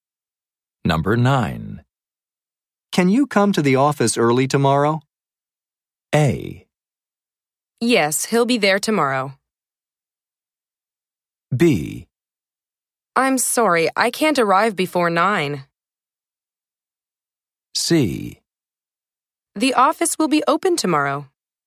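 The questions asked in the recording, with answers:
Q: Can you come to the office early tomorrow?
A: B: I'm sorry, I can't arrive before 9.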